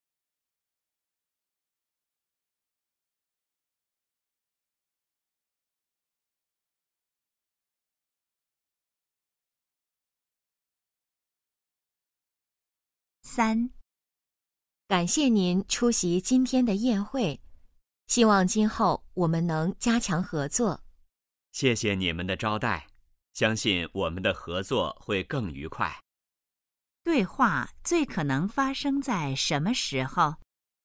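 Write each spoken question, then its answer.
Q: 对话最可能发生在什么时候?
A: 宴会上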